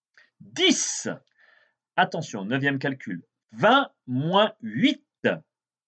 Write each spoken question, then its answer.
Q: 20 moins 8.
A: 12.